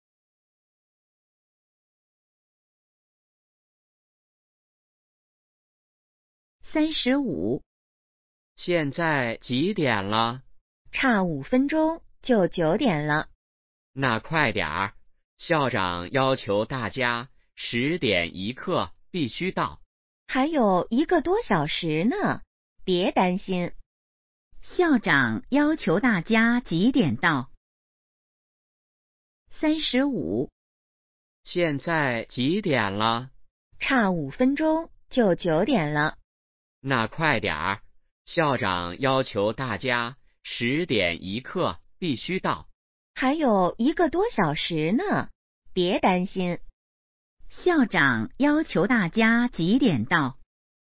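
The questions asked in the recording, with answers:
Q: 校长要求大家几点到?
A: 10点1刻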